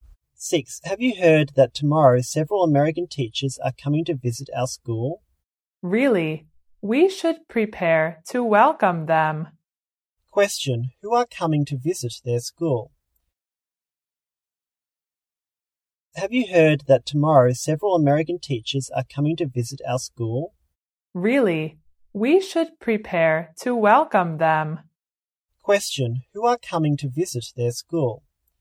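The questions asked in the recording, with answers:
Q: Who are coming to visit their school?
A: Several American teachers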